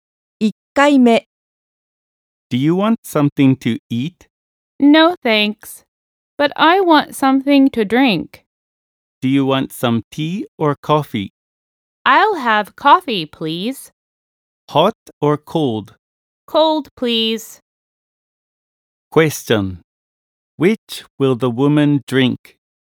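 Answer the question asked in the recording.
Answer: Cold coffee.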